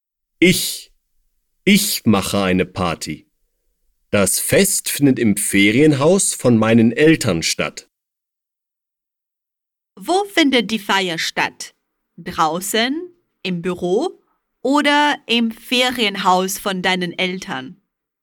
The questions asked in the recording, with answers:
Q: Wo findet die Feier statt?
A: Im Ferienhaus von meinen Eltern.